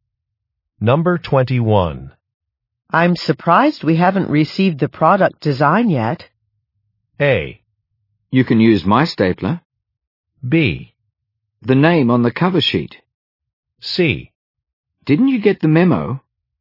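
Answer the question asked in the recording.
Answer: C: Didn't you get the memo?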